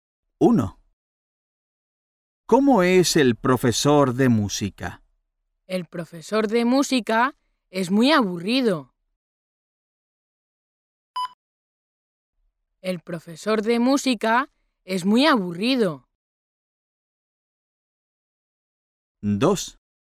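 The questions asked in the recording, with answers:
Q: ¿Cómo es el profesor de música?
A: muy aburrido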